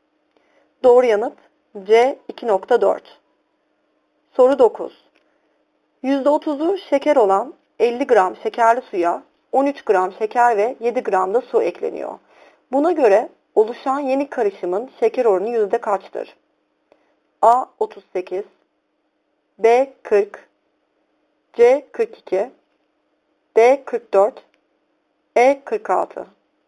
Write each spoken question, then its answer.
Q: Buna göre oluşan yeni karışımın şeker oranı yüzde kaçtır?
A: Doğru yanıt B 40.